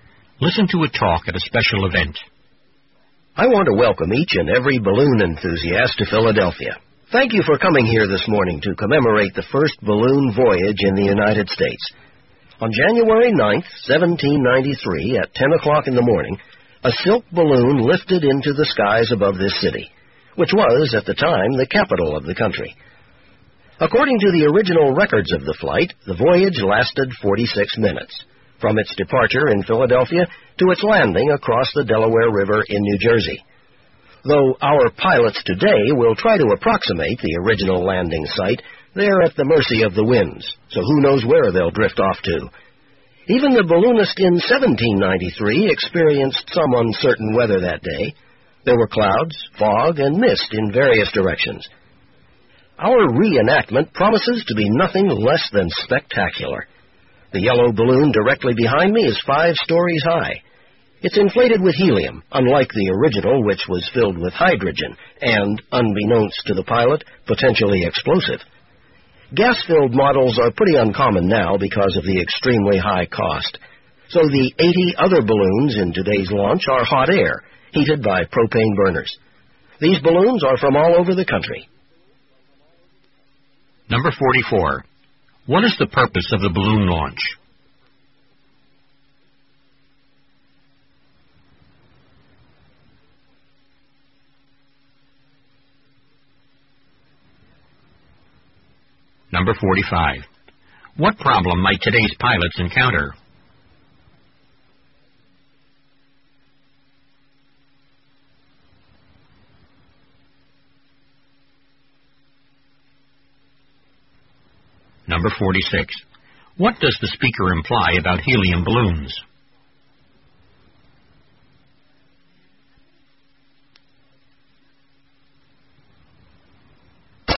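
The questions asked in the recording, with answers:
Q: What is the purpose of the balloon launch?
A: To commemorate the first balloon voyage in the United States

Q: What problem might today's pilots encounter?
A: The winds may carry them away from the original landing site

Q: What does the speaker imply about helium balloons?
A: They are uncommon because they are very expensive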